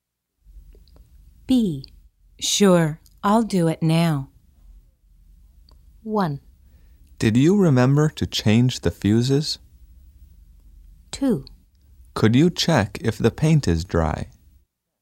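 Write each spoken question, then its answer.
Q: Sure, I'll do it now.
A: 2: Could you check if the paint is dry?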